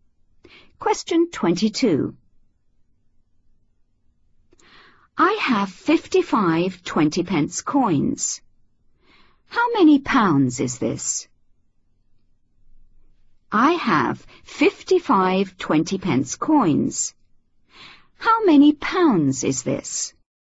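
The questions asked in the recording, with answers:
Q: How many pounds is this?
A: £11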